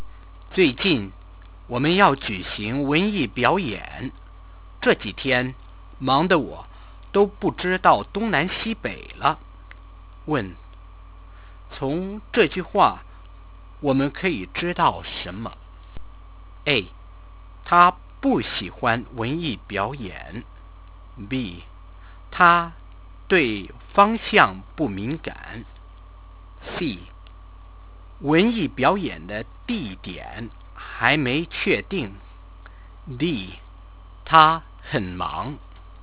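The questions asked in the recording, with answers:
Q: 从这句话我们可以知道什么?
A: D: 他很忙。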